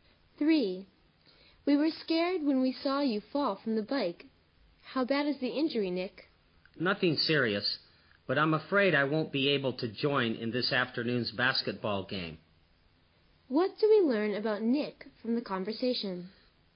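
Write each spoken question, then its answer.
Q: What do we learn about Nick from the conversation?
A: He won't be able to play in this afternoon's basketball game.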